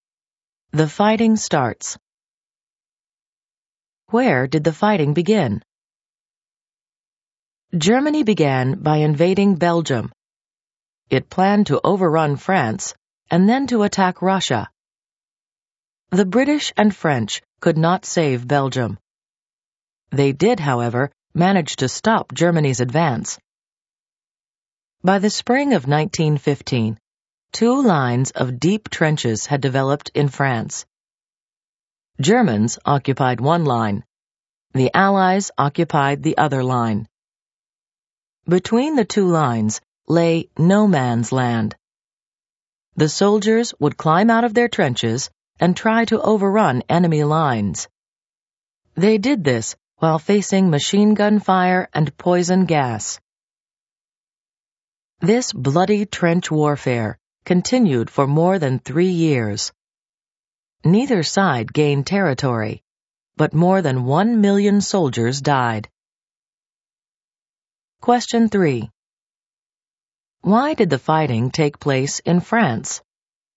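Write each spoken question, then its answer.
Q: Why did the fighting take place in France?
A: Germany went through Belgium planning to overrun France, and the British and French stopped its advance there, so trench lines formed in France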